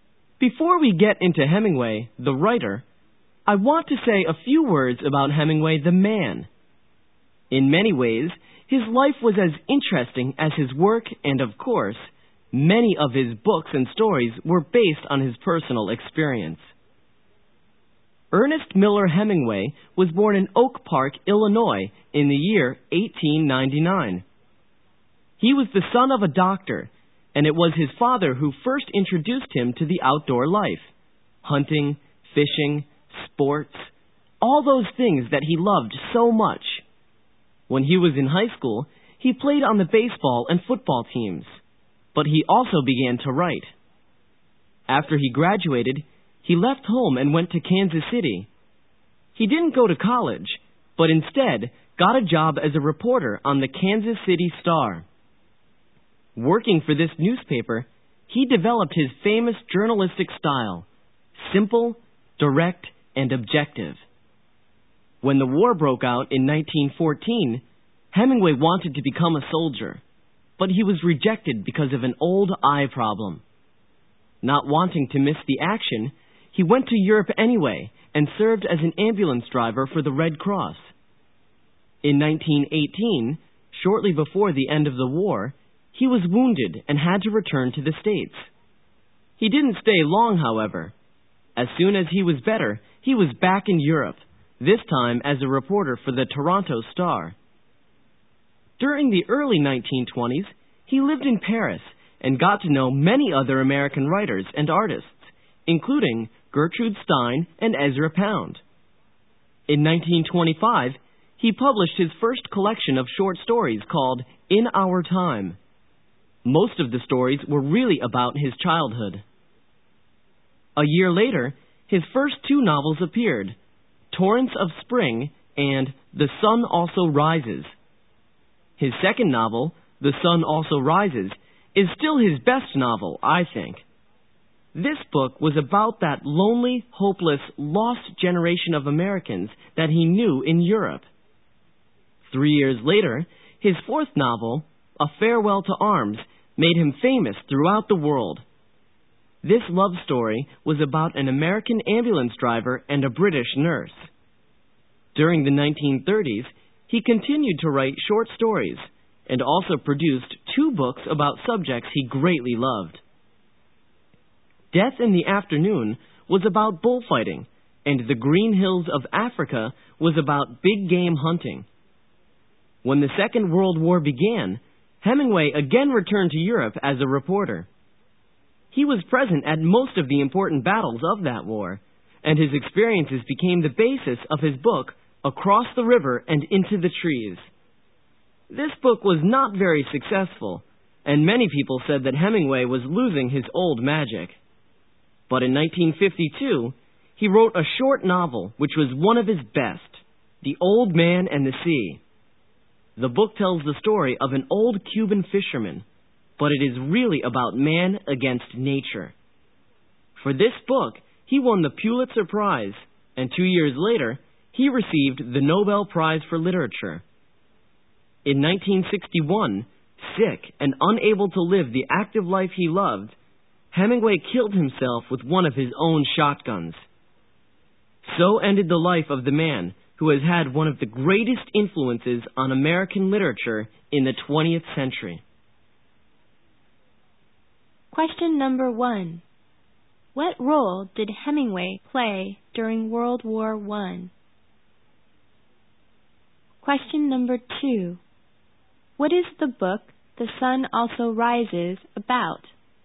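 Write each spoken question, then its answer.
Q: What role did Hemingway play during World War I?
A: He was an ambulance driver for the Red Cross

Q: What is the book The Sun Also Rises about?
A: The lonely, hopeless, lost generation of Americans he knew in Europe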